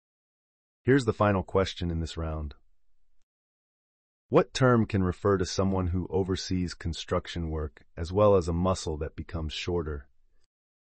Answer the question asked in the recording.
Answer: The answer is a contractor.